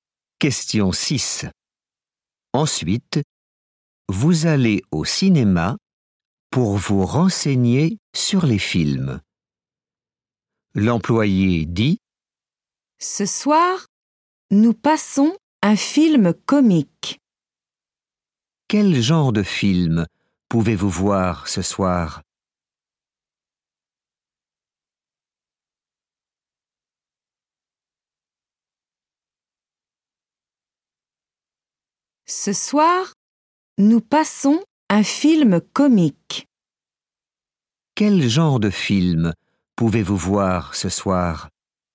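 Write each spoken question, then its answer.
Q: Quel genre de film pouvez-vous voir ce soir?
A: un film comique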